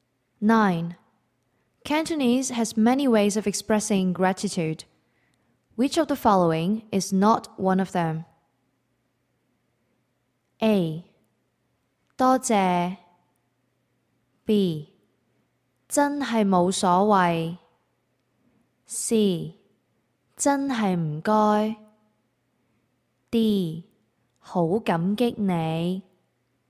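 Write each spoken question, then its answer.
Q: Which of the following is not one of them?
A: B: 真係冇所謂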